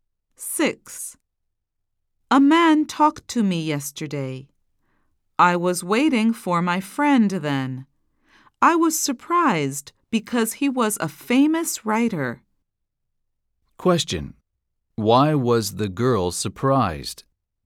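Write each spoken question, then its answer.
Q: Why was the girl surprised?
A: Because the man who talked to her was a famous writer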